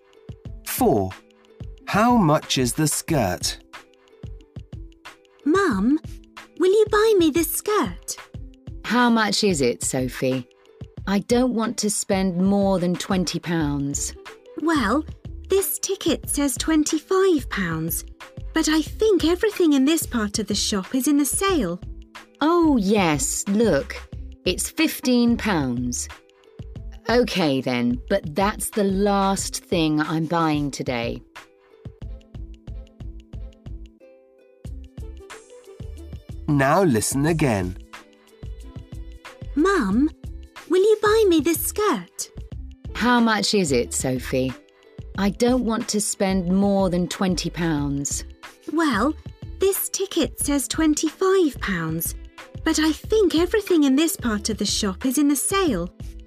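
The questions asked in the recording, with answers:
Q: How much is the skirt?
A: £15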